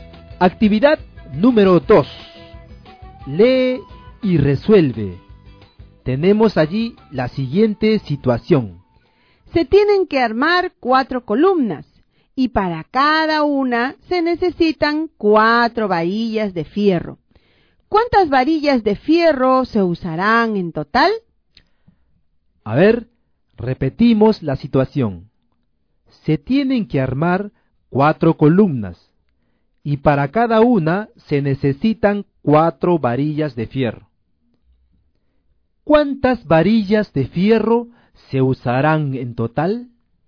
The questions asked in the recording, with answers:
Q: ¿Cuántas varillas de fierro se usarán en total?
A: se usarán 16 varillas de fierro.